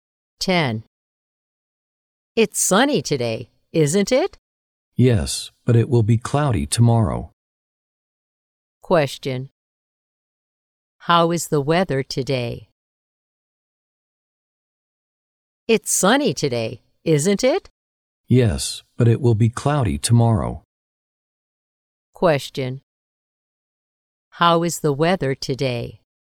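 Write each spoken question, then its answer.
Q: How is the weather today?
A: Sunny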